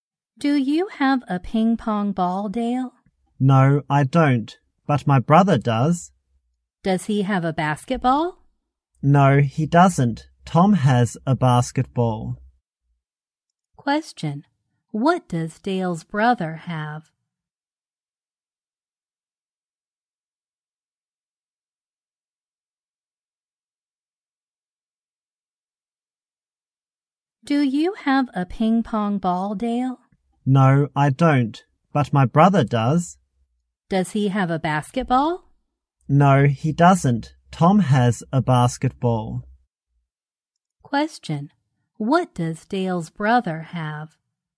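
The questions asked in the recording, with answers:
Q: What does Dale's brother have?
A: A ping pong ball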